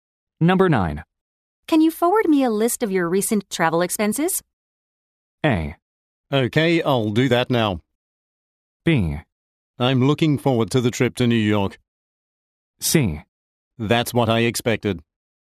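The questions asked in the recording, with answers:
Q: Can you forward me a list of your recent travel expenses?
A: A: Okay, I'll do that now.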